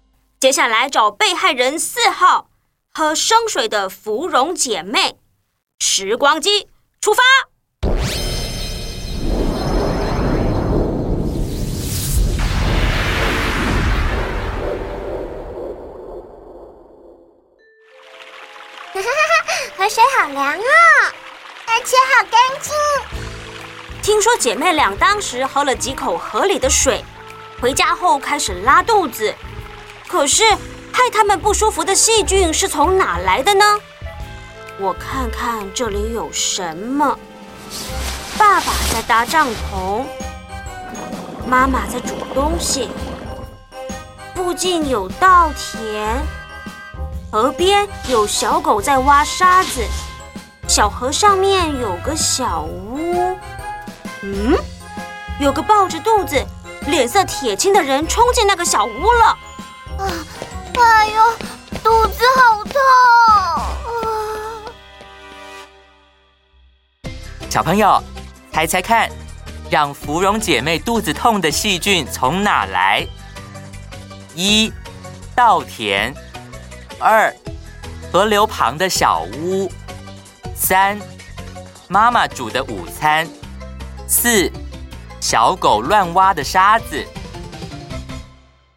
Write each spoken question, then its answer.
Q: 小朋友,猜猜看,让芙蓉姐妹肚子痛的细菌从哪来?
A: 答案是二,河流旁的小屋。